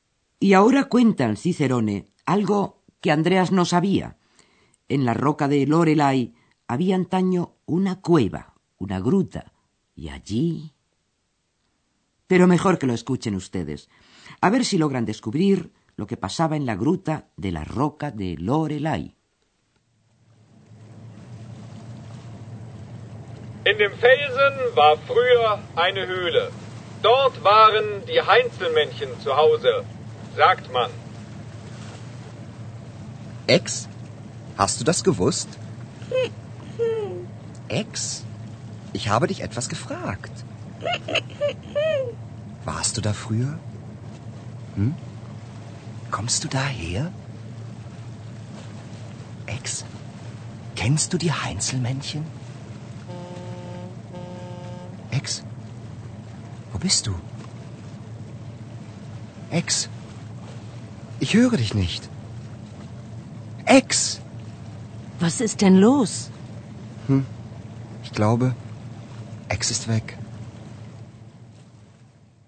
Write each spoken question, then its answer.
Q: a ver si logran descubrir lo que pasaba en la gruta de la roca de Lorelai.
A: Y aquella era la gruta donde habitaban los duendes, die Heinzelmännchen.